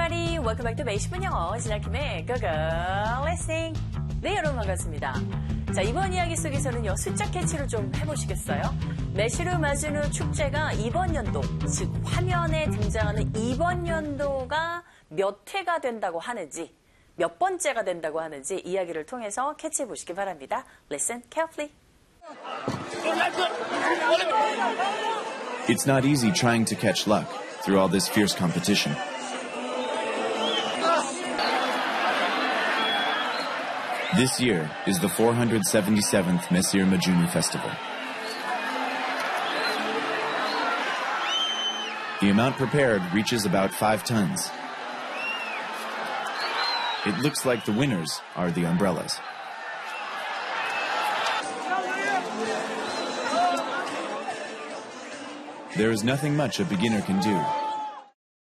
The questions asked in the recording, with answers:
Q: 매실을 맞은 후 축제가 이번 연도, 즉 화면에 등장하는 이번 연도가 몇 회가 된다고 하는지, 몇 번째가 된다고 하는지 이야기를 통해서 캐치해보시기 바랍니다.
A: 네, 바로 477번째 축제라고 하네요.